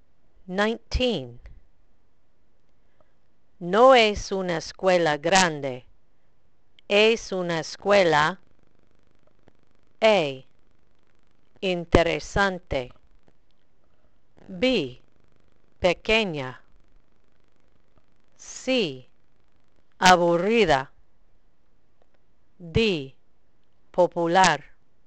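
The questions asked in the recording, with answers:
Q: No es una escuela grande. Es una escuela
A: B: pequeña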